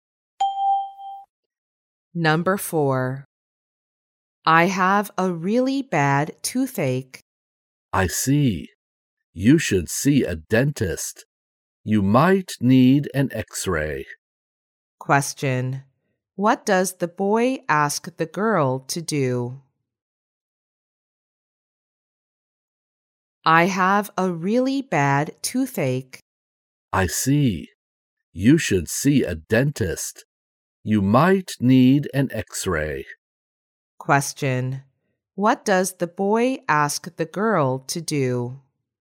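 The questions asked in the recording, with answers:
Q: What does the boy ask the girl to do?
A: See a dentist.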